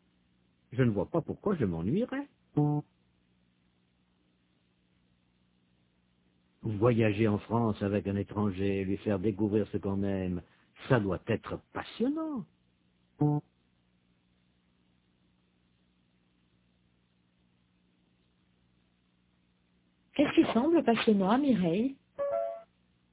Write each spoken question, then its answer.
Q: Qu'est-ce qui semble passionnant à Mireille ?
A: Voyager en France avec un étranger, lui faire découvrir ce qu'on aime.